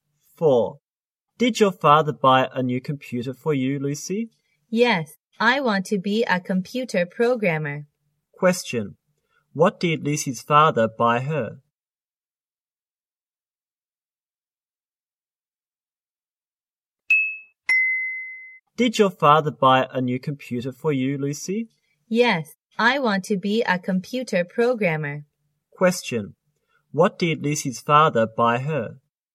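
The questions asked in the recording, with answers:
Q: What did Lucy's father buy her?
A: A new computer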